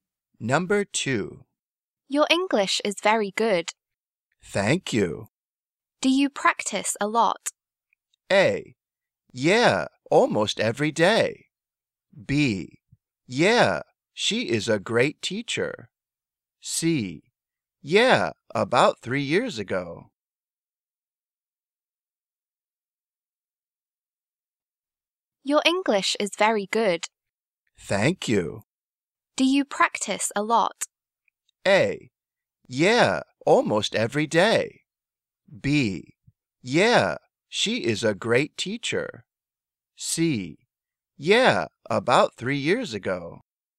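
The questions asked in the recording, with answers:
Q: Do you practice a lot?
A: A: Yeah, almost every day.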